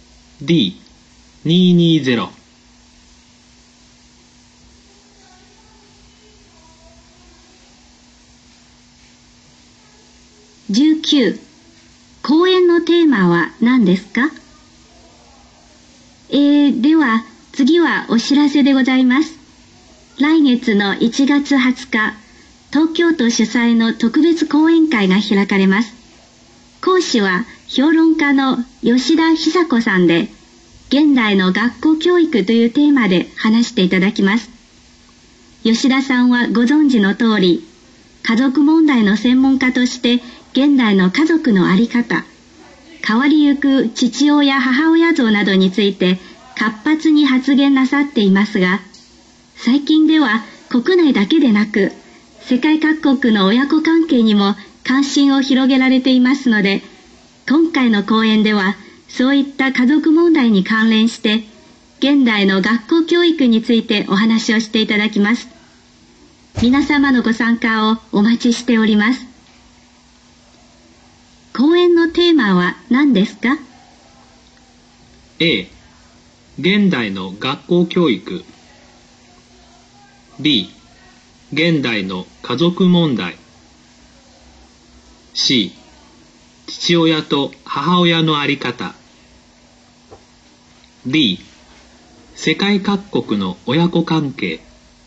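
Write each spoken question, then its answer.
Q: 講演のテーマは何ですか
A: A: 現代の学校教育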